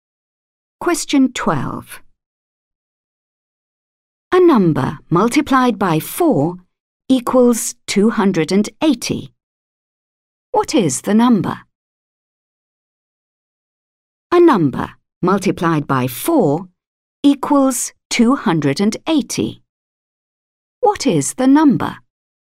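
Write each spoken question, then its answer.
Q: What is the number?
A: 70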